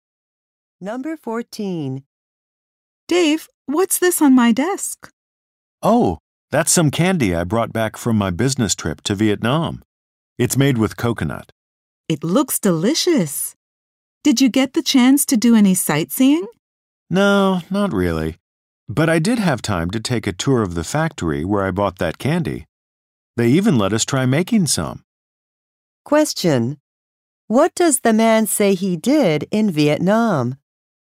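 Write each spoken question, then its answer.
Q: What does the man say he did in Vietnam?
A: Toured a candy factory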